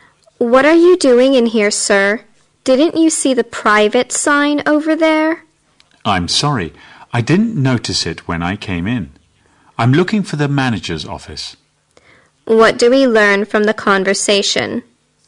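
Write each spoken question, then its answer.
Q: What do we learn from the conversation?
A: The man went into a private area by mistake while looking for the manager's office.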